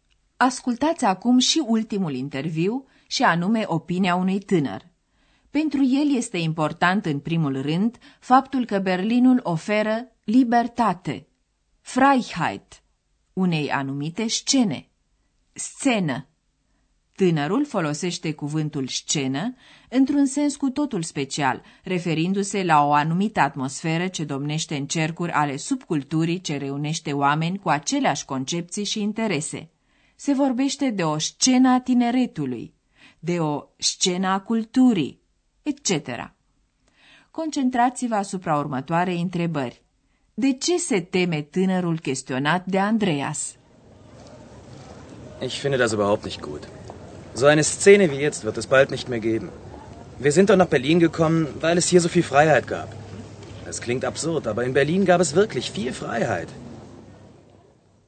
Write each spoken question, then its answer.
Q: De ce se teme tânărul chestionat de Andreas?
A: Tânărul se teme că o astfel de scenă, ca cea de acum, în curând nu va mai exista.